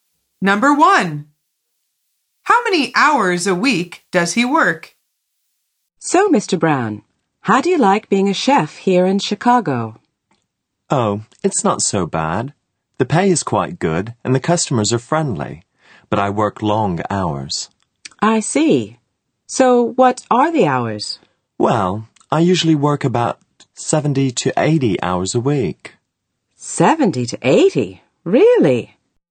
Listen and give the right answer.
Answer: The answer is 70 to 80.